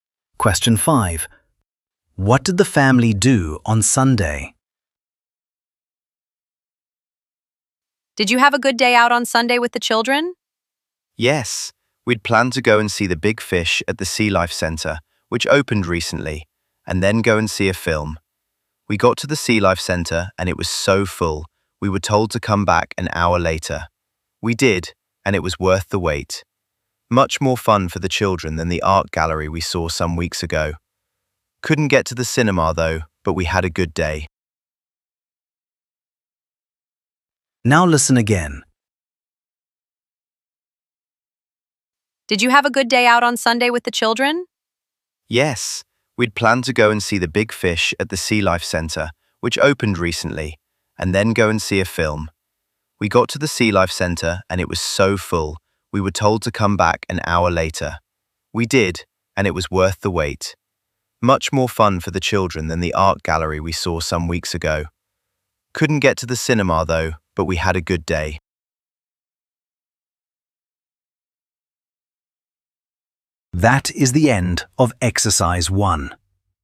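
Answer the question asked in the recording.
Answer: They went to the Sea Life Centre to see the big fish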